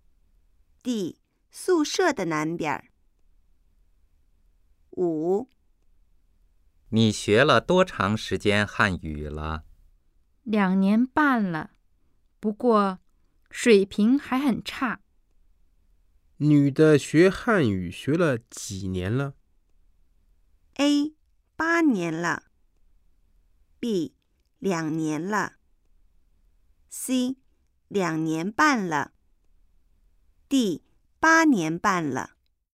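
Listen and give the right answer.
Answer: C: 两年半了。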